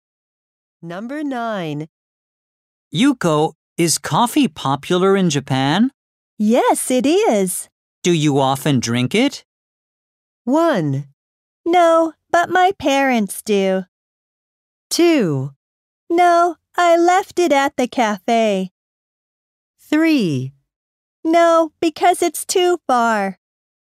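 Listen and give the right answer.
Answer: 1: No, but my parents do.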